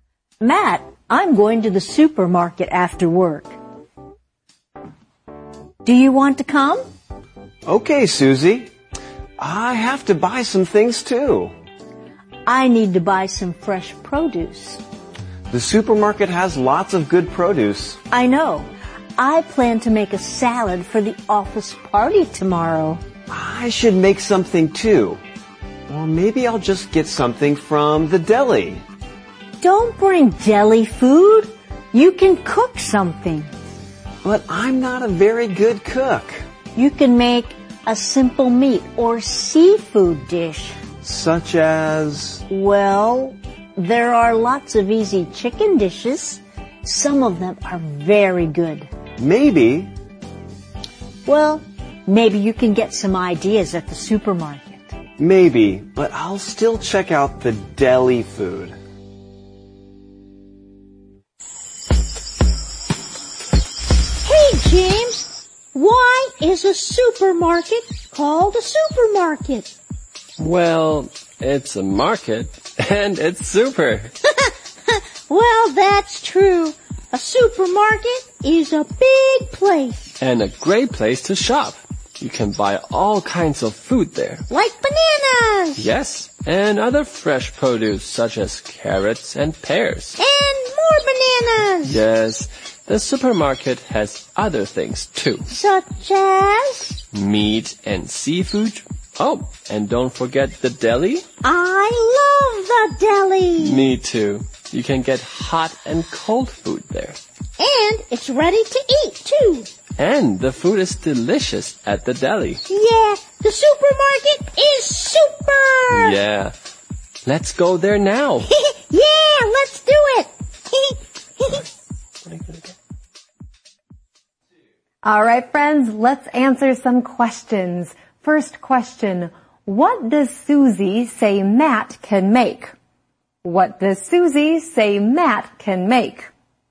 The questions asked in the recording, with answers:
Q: What does Susie say Matt can make?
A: He can make a simple meat or seafood dish.